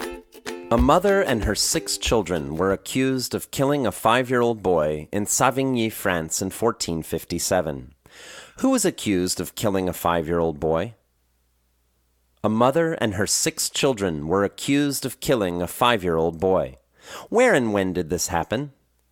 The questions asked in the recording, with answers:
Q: Who was accused of killing a five-year-old boy?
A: A mother and her six children were accused of killing a five-year-old boy.

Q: Where and when did this happen?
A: It happened in Savigny, France in 1457.